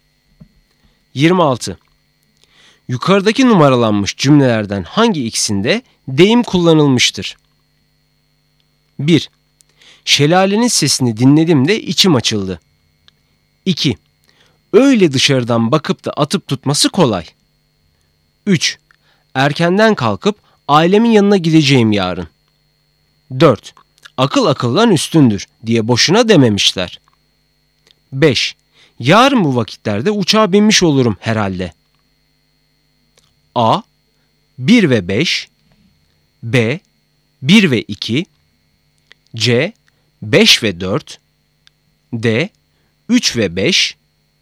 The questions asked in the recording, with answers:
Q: Yukarıdaki numaralanmış cümlelerden hangi ikisinde deyim kullanılmıştır?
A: Doğru cevap B, 1 ve 2.